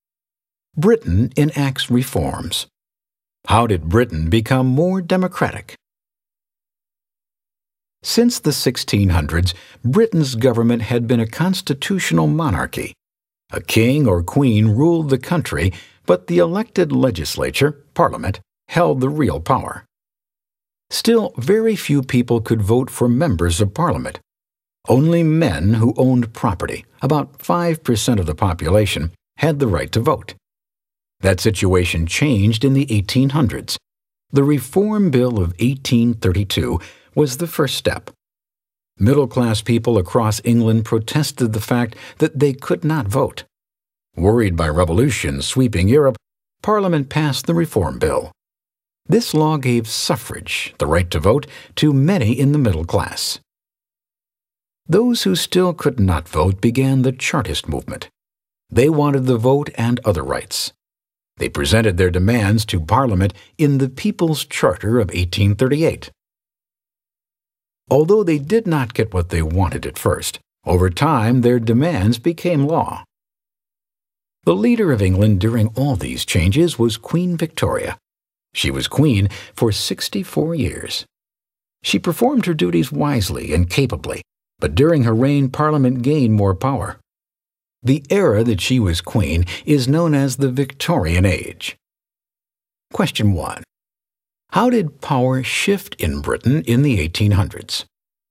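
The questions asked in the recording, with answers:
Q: How did power shift in Britain in the 1800s?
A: Parliament gained more power and the right to vote spread to more people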